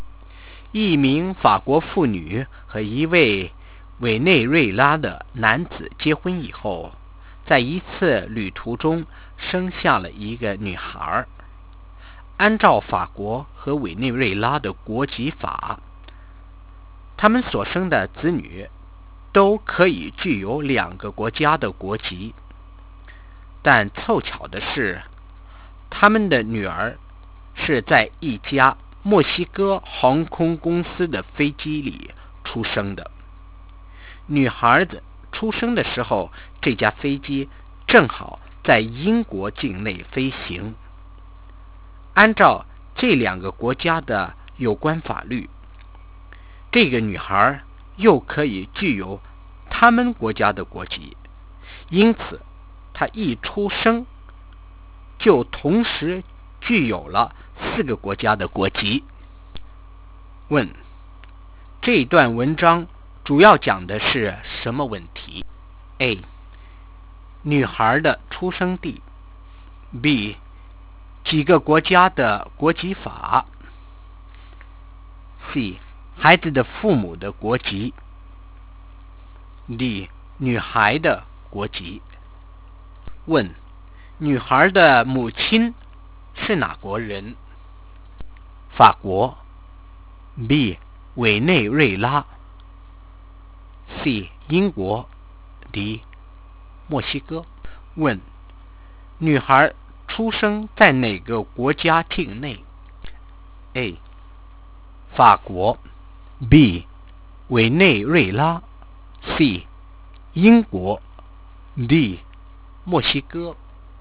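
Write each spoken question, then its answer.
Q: 这段文章主要讲的是什么问题?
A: D: 女孩的国籍。

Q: 女孩的母亲是哪国人?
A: A: 法国。

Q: 女孩出生在哪个国家境内?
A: C: 英国。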